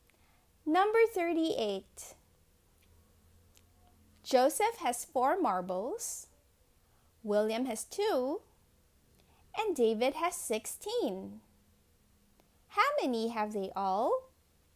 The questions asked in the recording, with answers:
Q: How many have they all?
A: The answer is they have 22 marbles in all.